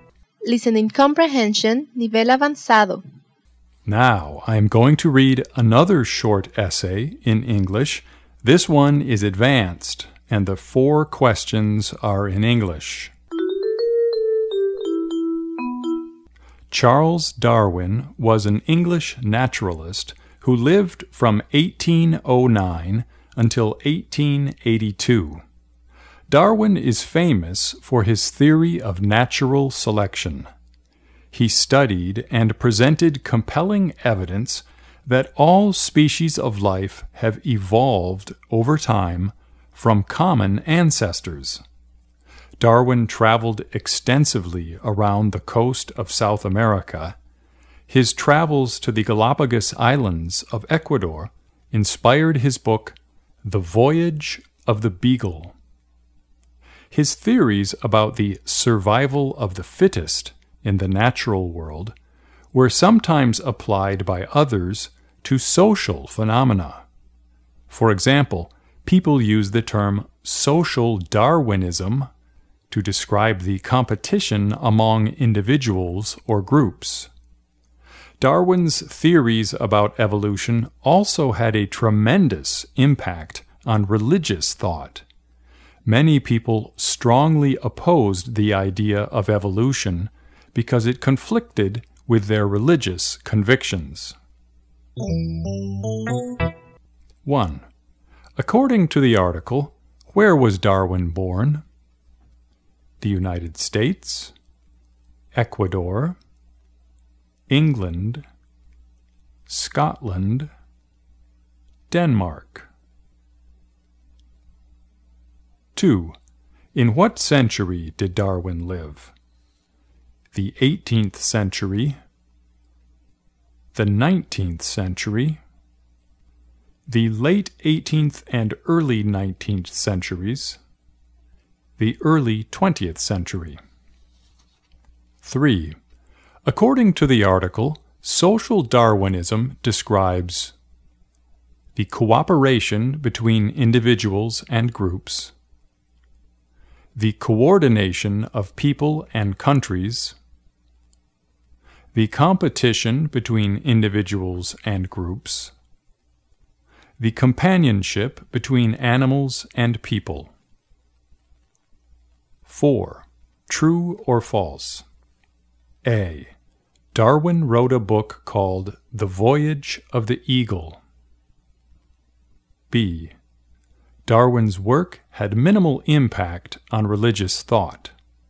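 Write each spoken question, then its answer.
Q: According to the article, where was Darwin born?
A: England

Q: In what century did Darwin live?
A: The 19th century

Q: According to the article, social Darwinism describes the cooperation between individuals and groups the coordination of people and countries, the competition between individuals and groups, the companionship between animals and people.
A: The competition between individuals and groups

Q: True or false? A. Darwin wrote a book called The Voyage of the Eagle.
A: False

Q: B. Darwin's work had minimal impact on religious thought.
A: False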